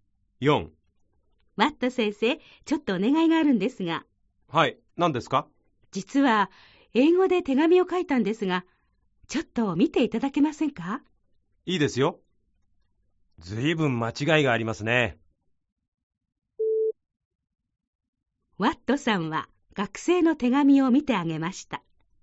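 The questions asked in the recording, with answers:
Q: ワットさんは学生の手紙を見てあげました。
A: ○(正しい)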